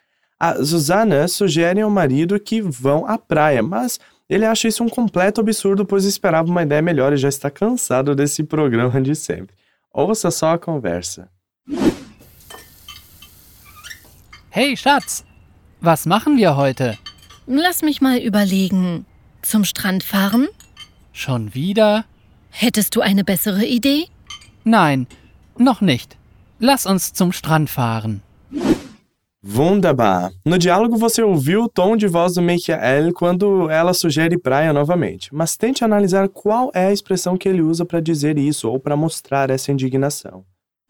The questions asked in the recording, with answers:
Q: No diálogo você ouviu o tom de voz do Michael quando ela sugere praia novamente, mas tente analisar qual é a expressão que ele usa para dizer isso ou para mostrar essa indignação.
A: Aí o Michael fica indignado com a sugestão e responde: Schon wieder?